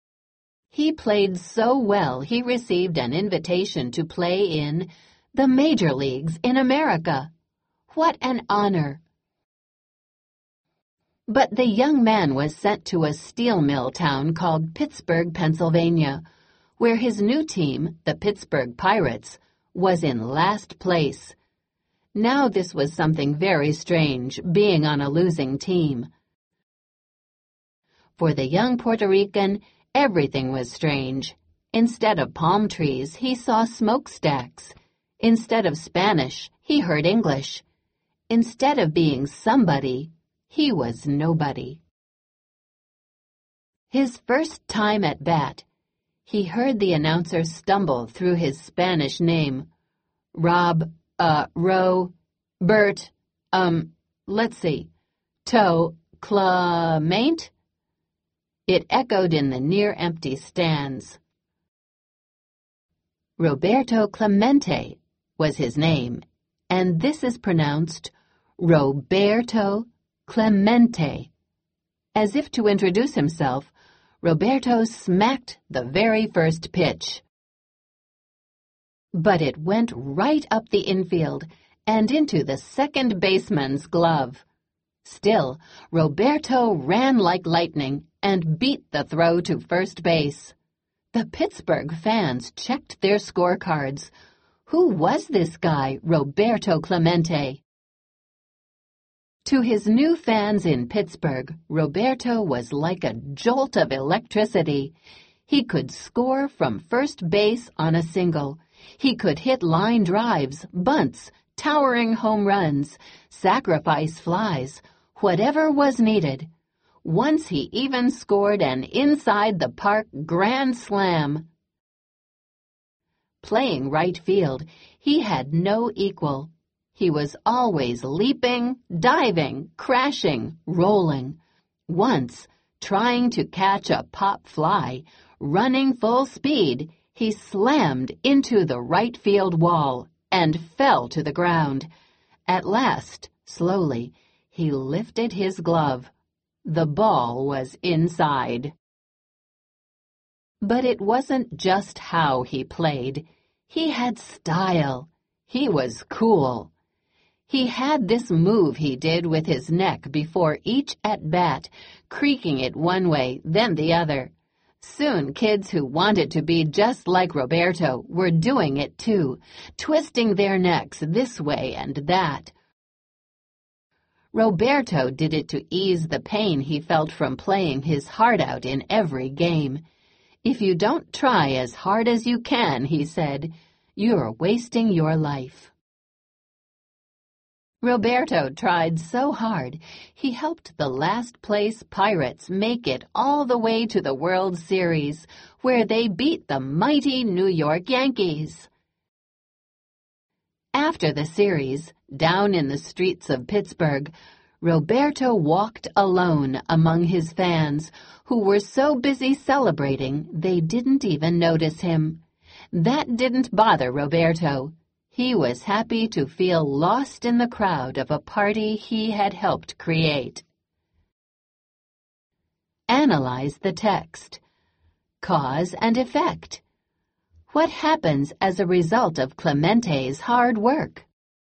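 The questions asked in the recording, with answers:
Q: What happens as a result of Clemente's hard work?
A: He helped the last-place Pirates reach the World Series and beat the New York Yankees.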